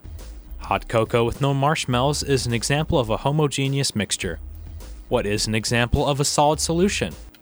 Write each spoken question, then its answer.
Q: What is an example of a solid solution?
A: Steel is an example of a solid solution.